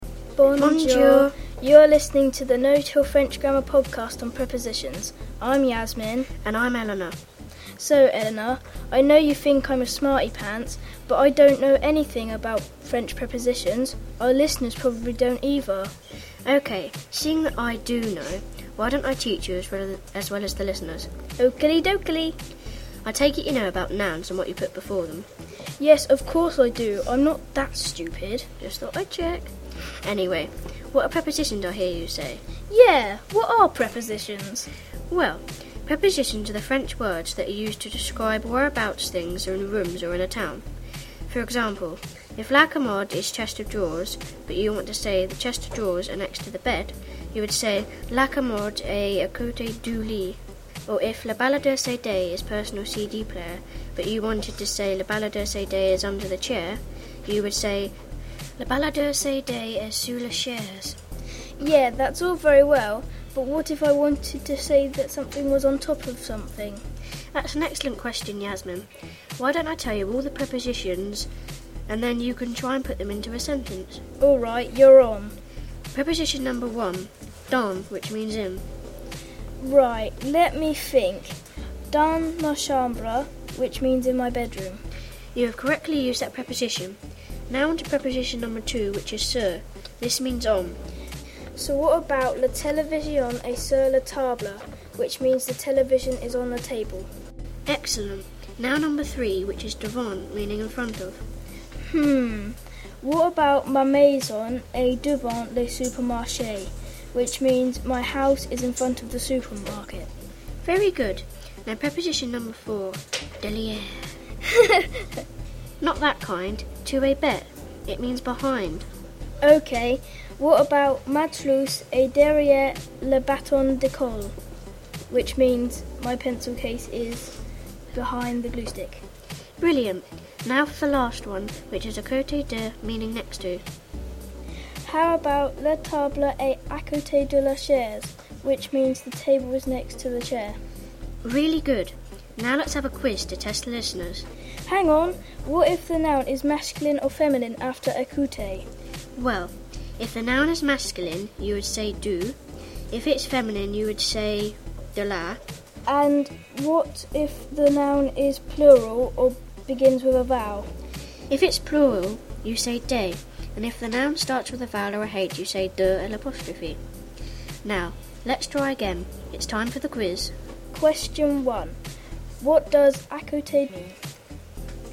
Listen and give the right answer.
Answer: The answer is next to.